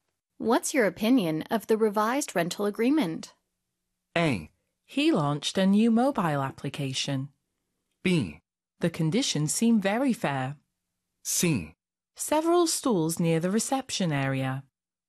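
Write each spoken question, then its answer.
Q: What's your opinion of the revised rental agreement?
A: B: The conditions seem very fair.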